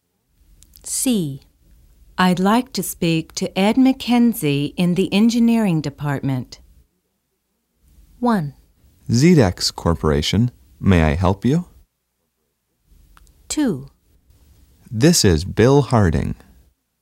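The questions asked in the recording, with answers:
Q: I'd like to speak to Ed McKenzie in the engineering department.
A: 1: ZDEX Corporation, may I help you?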